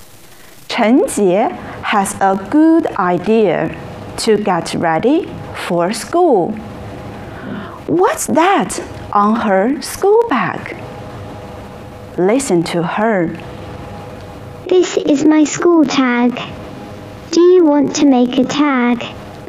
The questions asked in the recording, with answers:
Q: What's that on her school bag?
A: Oh, it's Chen Jie's school tag.